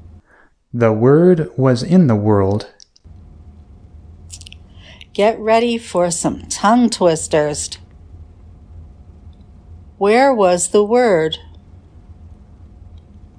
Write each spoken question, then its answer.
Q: Where was the Word?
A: The Word was in the world.